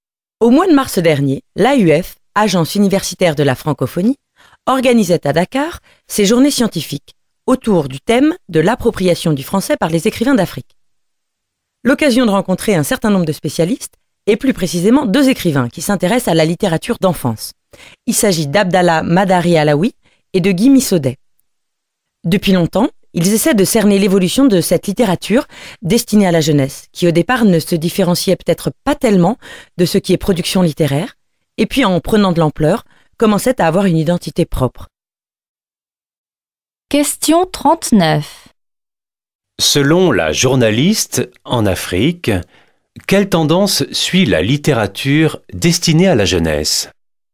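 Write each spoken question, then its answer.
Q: Selon la journaliste, en Afrique, quelle tendance suit la littérature destinée à la jeunesse ?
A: Elle acquiert progressivement une identité propre, distincte de la production littéraire générale.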